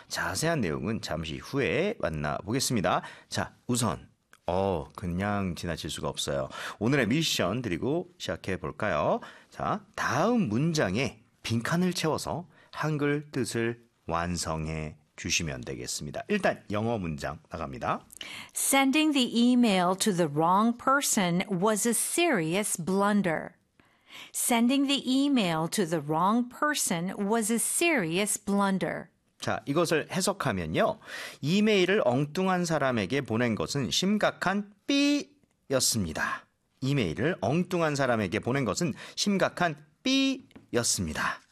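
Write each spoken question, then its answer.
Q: 이메일을 엉뚱한 사람에게 보낸 것은 심각한 삐였습니다.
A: 실수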